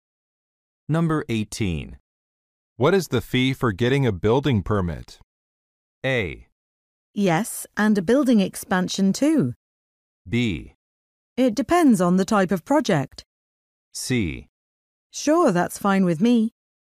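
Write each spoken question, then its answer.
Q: What is the fee for getting a building permit?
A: B: It depends on the type of project.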